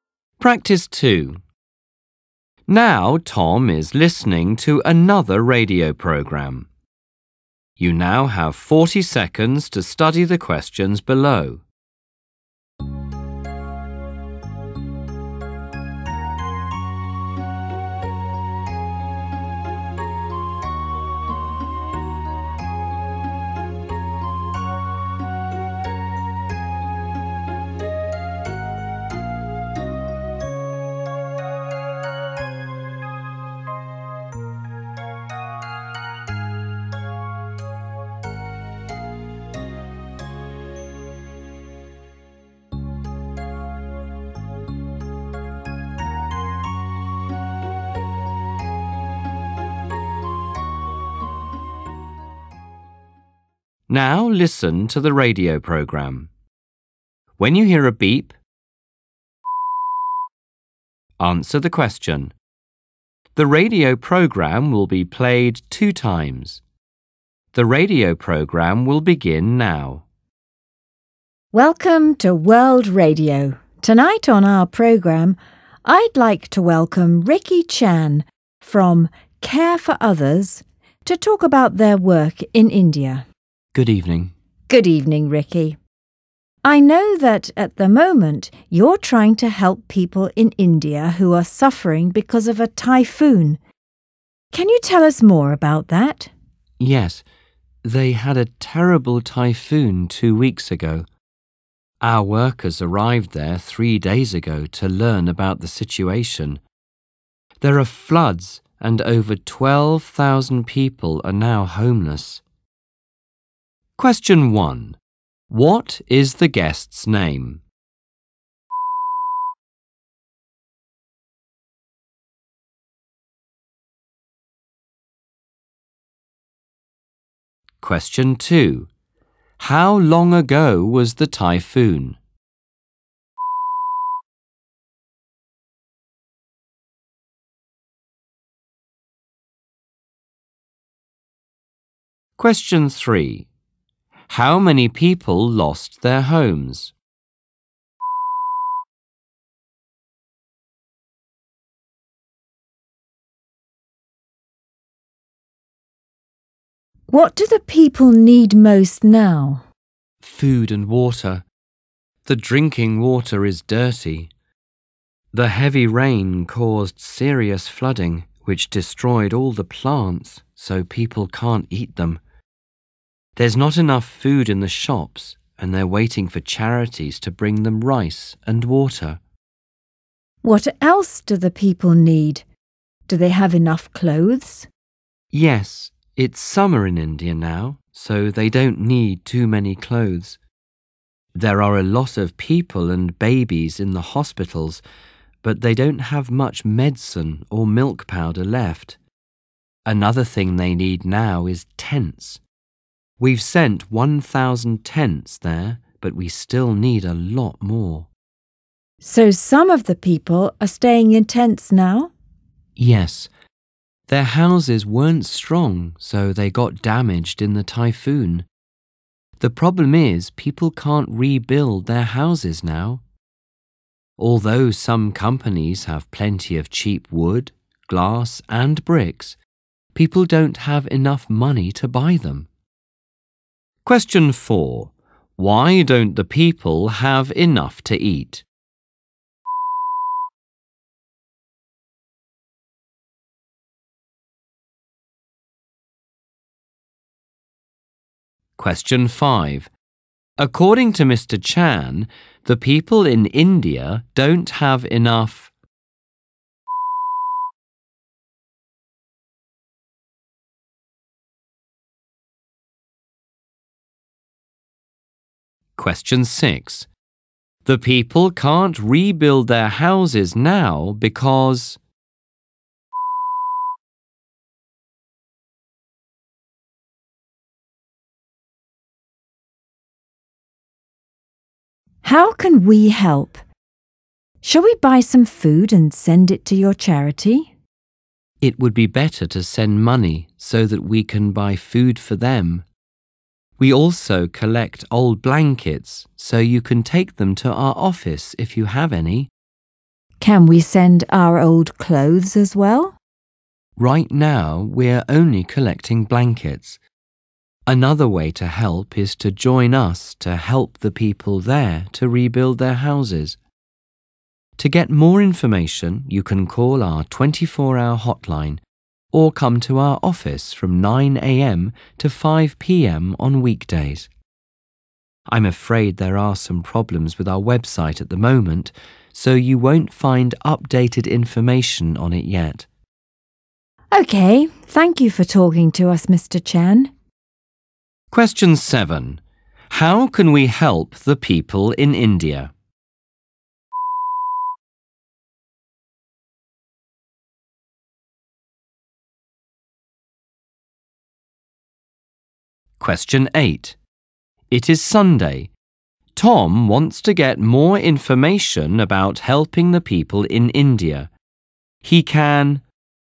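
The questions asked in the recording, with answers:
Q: What is the guest's name?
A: Ricky Chan

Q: How long ago was the typhoon?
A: 2 weeks ago

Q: How many people lost their homes?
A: over 12,000

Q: Why don't the people have enough to eat?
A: The flooding destroyed all the plants and there's not enough food in the shops

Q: The people can't rebuild their houses now because.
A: they don't have enough money to buy materials

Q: It is Sunday. Tom wants to get more information about helping the people in India. He can...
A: call the 24-hour hotline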